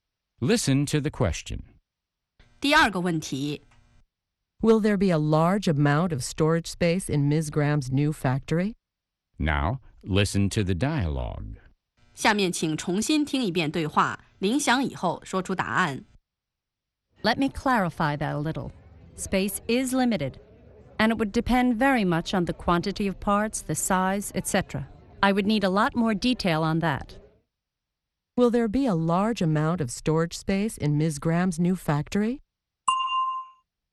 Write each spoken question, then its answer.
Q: Will there be a large amount of storage space in Ms. Graham's new factory?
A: No, there won't be. As Ms. Graham says, space is limited.